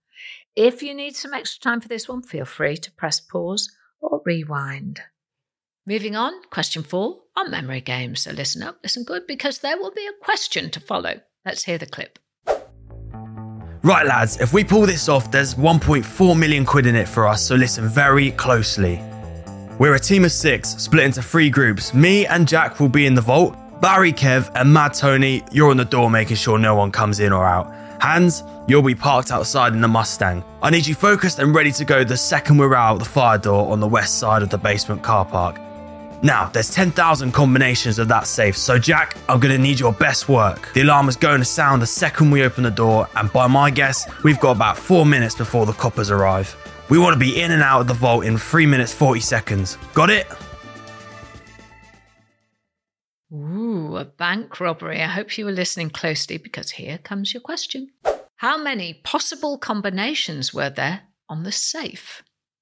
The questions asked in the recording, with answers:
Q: How many possible combinations were there on the safe?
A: The answer is 10,000 possible combinations on that safe.